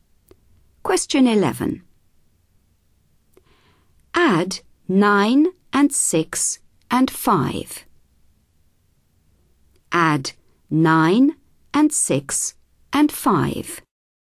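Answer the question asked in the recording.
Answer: 20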